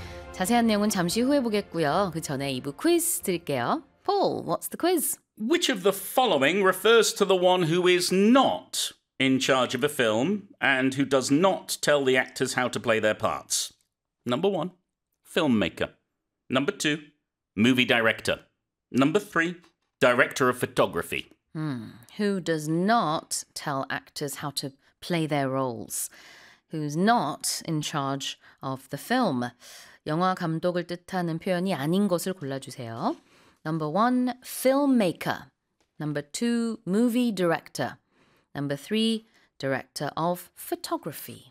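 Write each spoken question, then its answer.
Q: Which of the following refers to the one who is not in charge of a film and who does not tell the actors how to play their parts?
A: 3: director of photography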